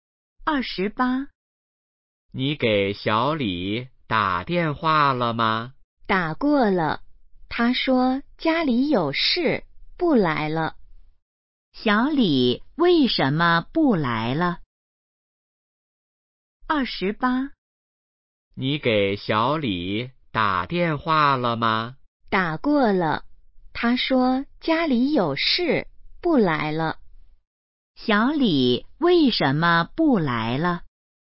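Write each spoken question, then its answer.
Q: 小李为什么不来了?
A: 家里有事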